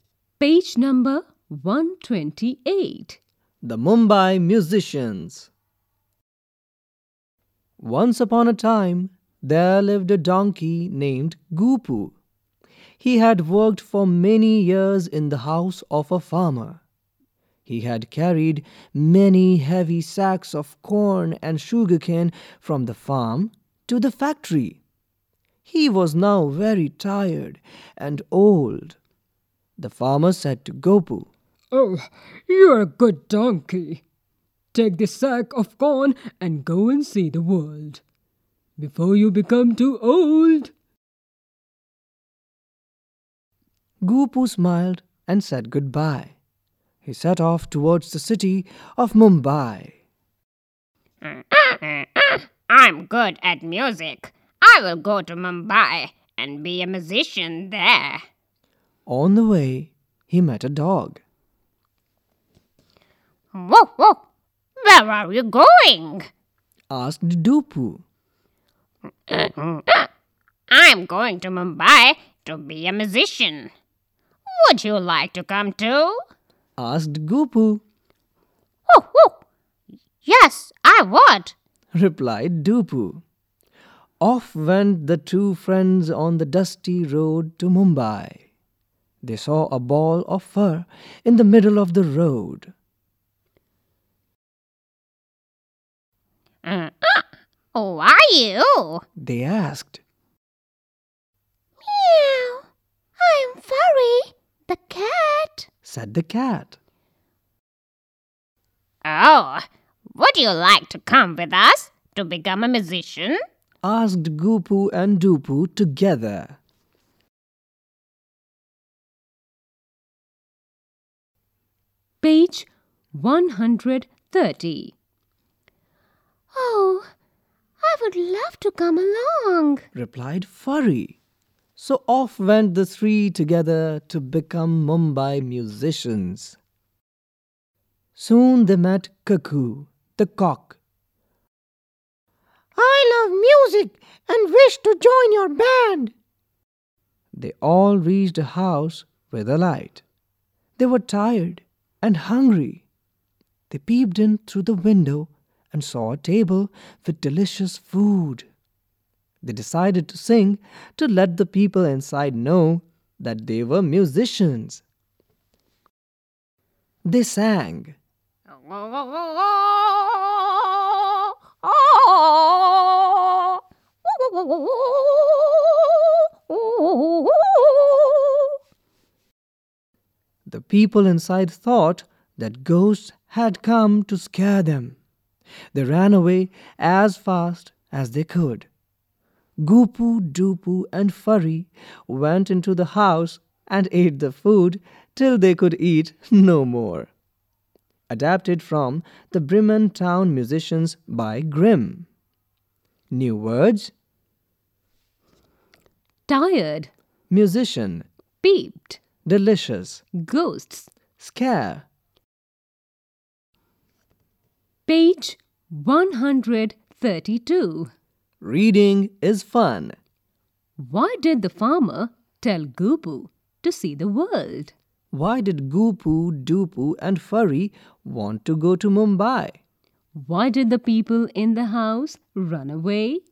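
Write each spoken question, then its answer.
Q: Why did the farmer tell Gupu to see the world?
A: Because Gupu was now old and tired, and the farmer wanted him to see the world before he became too old.

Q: Why did Gupu, Gupu and Furry want to go to Mumbai?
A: To become musicians.

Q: Why did the people in the house run away?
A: They thought ghosts had come to scare them.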